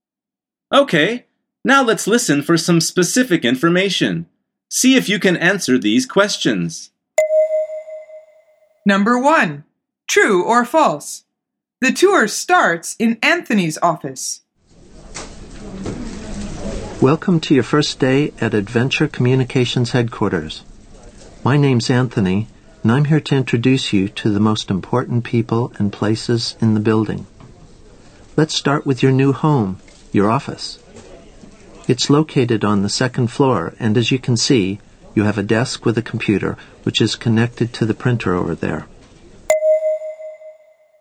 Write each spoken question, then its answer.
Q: The tour starts in Anthony's office.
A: The answer is false. He starts by showing the new person their office.